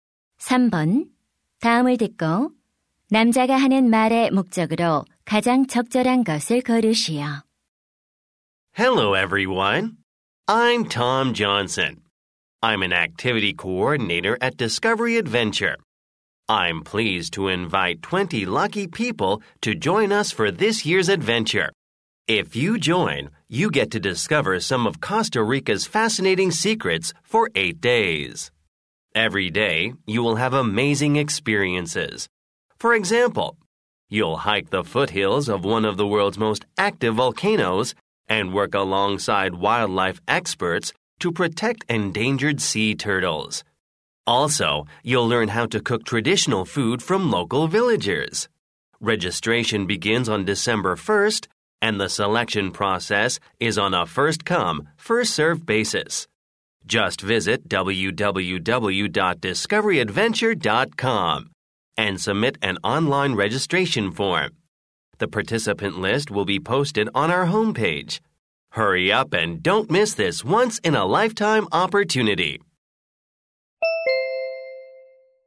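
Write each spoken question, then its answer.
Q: 다음을 듣고 남자가 하는 말의 목적으로 가장 적절한 것을 고르시오.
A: 코스타리카 모험 프로그램 참가자 모집을 안내하려고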